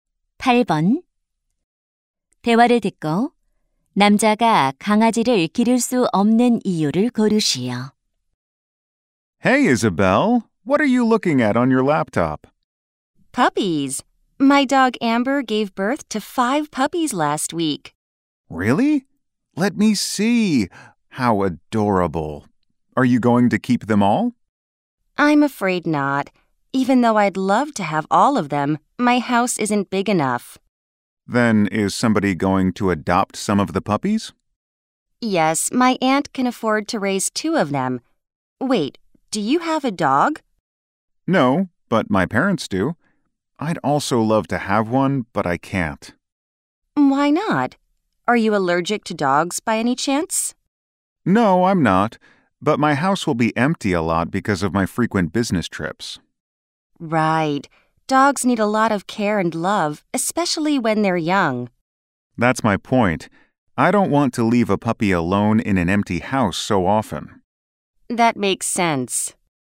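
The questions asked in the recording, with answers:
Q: 대화를 듣고 남자가 강아지를 기를 수 없는 이유를 고르시오.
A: 출장이 잦아서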